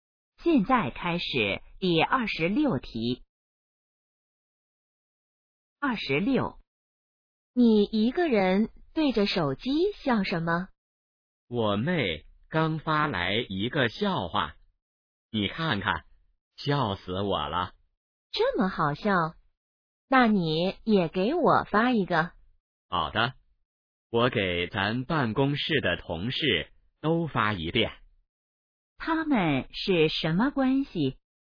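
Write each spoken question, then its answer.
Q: 他们是什么关系?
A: 同事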